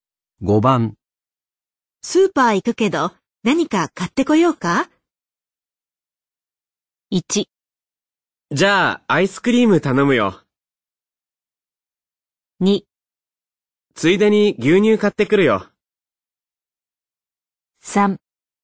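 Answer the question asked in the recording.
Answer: 1: じゃあアイスクリーム頼むよ。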